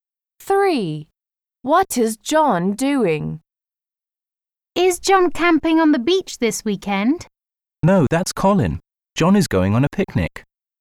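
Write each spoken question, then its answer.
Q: What is John doing?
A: going on a picnic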